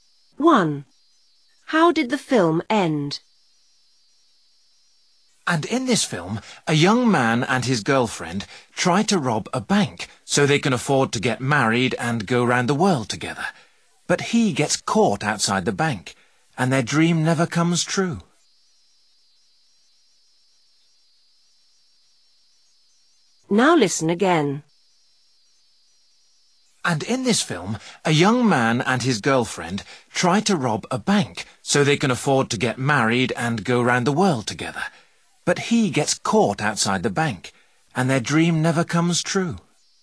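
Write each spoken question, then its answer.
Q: How did the film end?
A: The man was caught outside the bank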